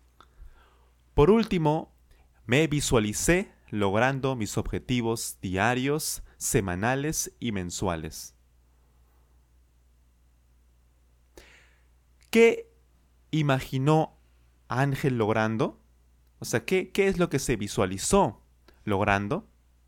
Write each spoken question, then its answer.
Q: ¿Qué imaginó Ángel logrando?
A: Sí, cierto. Él se visualizó logrando sus objetivos diarios, semanales y mensuales.